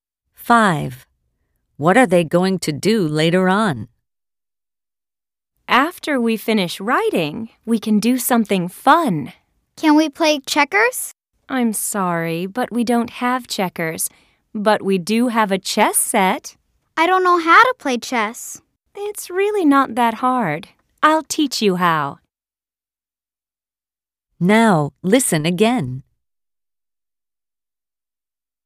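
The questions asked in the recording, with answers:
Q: What are they going to do later on?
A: play chess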